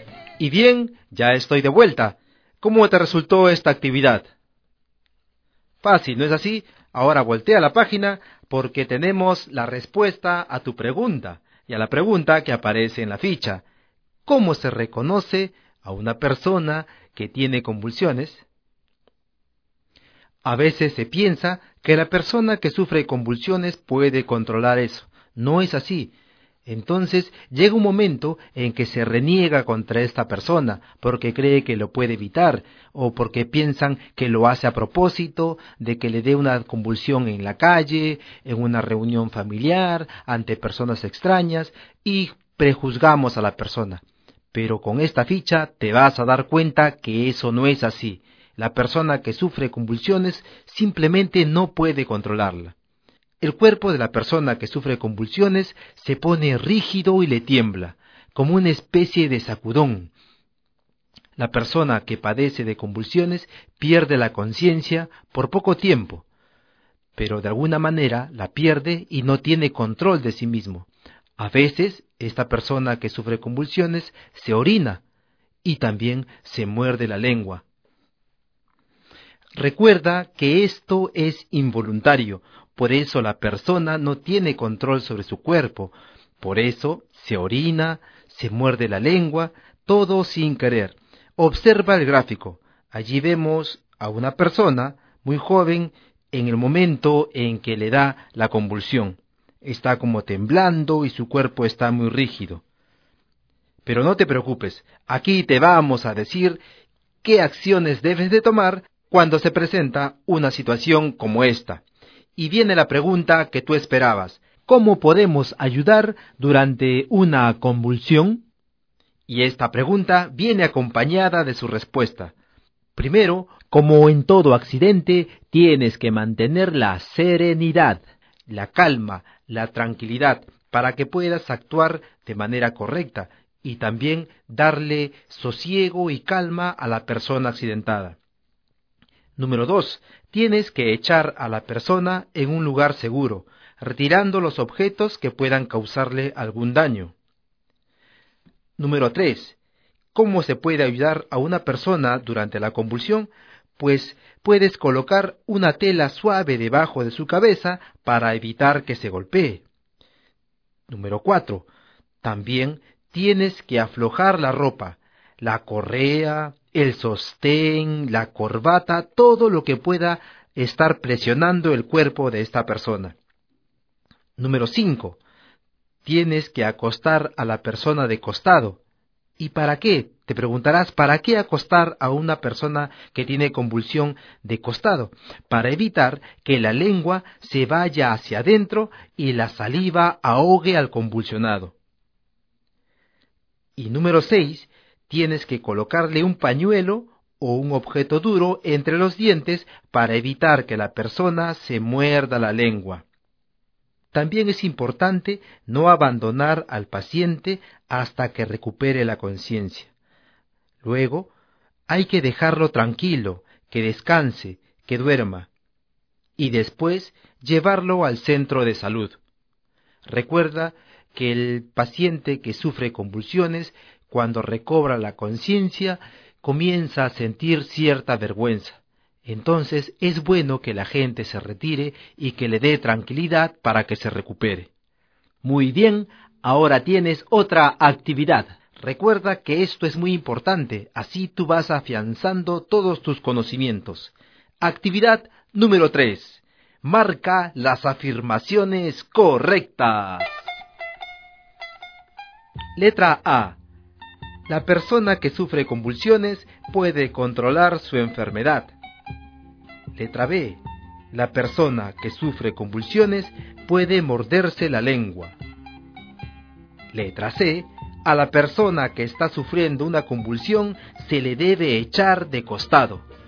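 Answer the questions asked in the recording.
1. Falso
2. Verdadero
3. Verdadero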